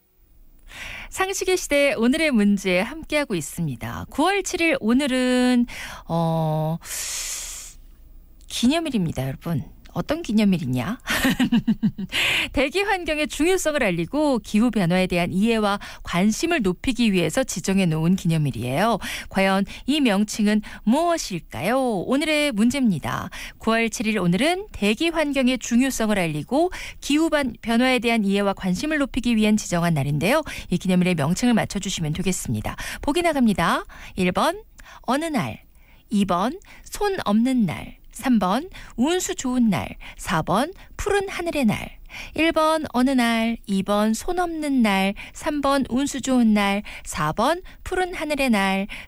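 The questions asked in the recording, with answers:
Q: 이 기념일의 명칭을 맞춰주시면 되겠습니다.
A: 4번: 푸른 하늘의 날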